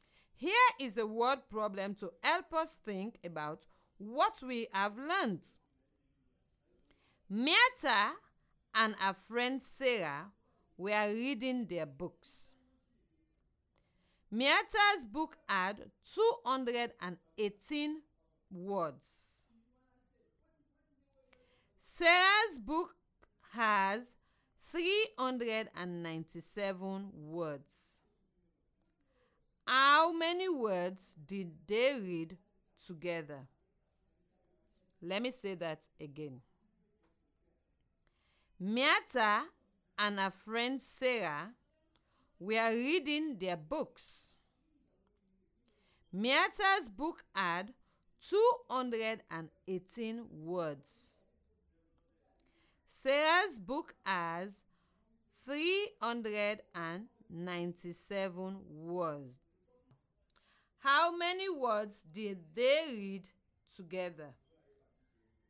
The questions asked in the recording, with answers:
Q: How many words did they read together?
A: The number is 615.